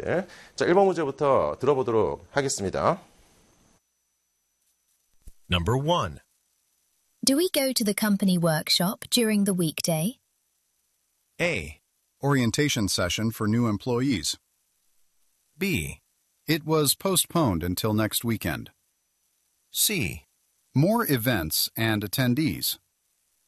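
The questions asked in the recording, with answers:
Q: Do we go to the company workshop during the weekday?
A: B: It was postponed until next weekend.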